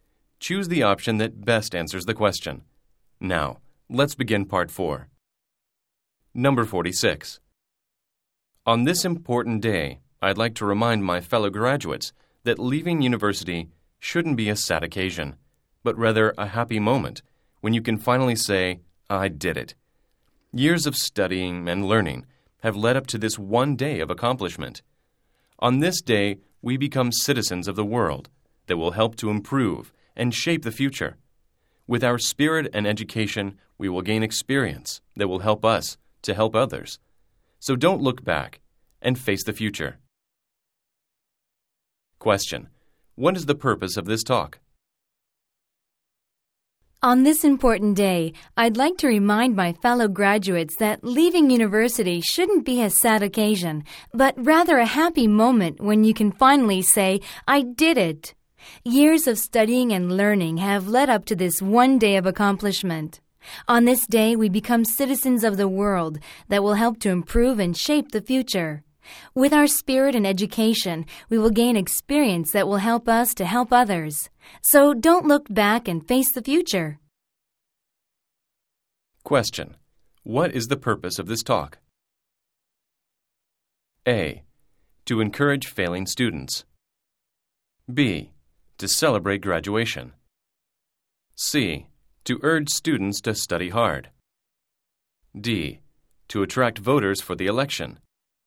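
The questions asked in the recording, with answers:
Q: What is the purpose of this talk?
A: B: To celebrate graduation.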